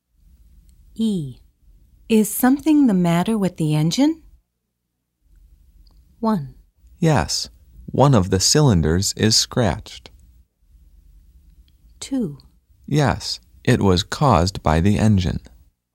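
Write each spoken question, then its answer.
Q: Is something the matter with the engine?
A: 1: Yes, one of the cylinders is scratched.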